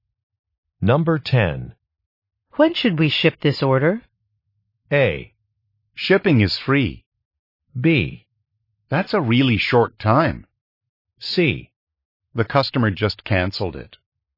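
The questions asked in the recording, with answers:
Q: When should we ship this order?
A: C: The customer just canceled it.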